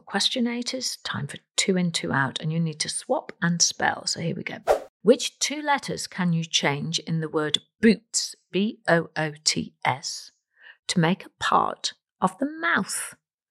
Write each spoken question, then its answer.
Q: Which two letters can you change in the word boots, B-O-O-T-S, to make a part of the mouth?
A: Well, change the letter B for a T, change the letter S into an H, and you get tooth, T-O-O-T-H.